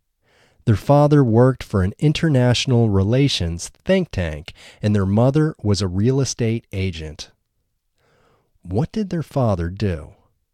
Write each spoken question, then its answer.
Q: What did their father do?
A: Their father worked for an international think tank.